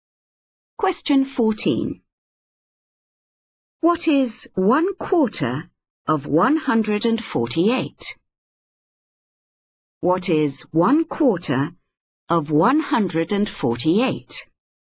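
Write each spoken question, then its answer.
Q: What is 1/4 of 148?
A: 37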